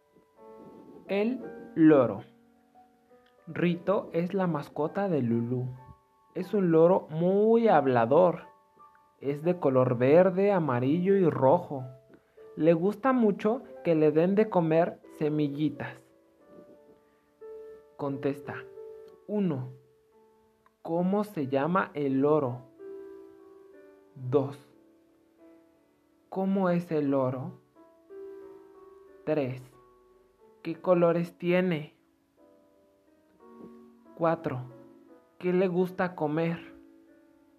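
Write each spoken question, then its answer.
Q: ¿Cómo se llama el loro?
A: Rito

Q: ¿Cómo es el loro?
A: Muy hablador

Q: ¿Qué colores tiene?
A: Verde, amarillo y rojo

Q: ¿Qué le gusta comer?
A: Semillitas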